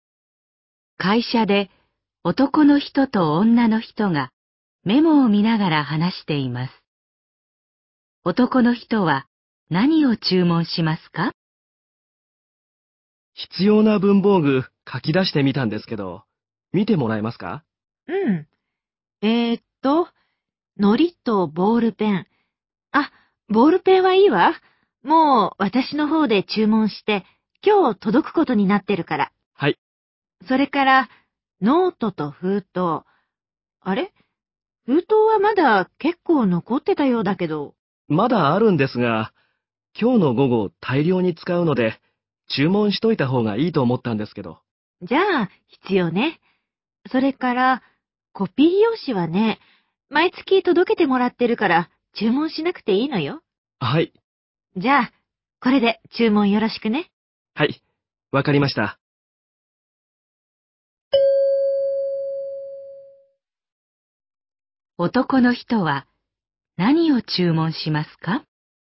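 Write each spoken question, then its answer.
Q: 男の人は何を注文しますか?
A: 糊とノートと封筒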